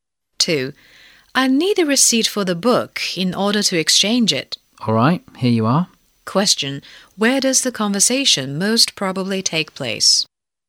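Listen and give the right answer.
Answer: In a bookstore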